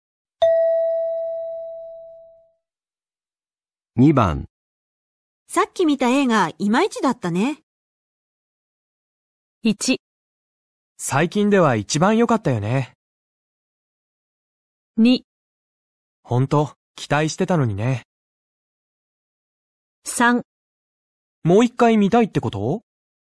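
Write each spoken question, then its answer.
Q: さっき見た映画、いまいちだったね。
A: 2: 本当、期待してたのにね。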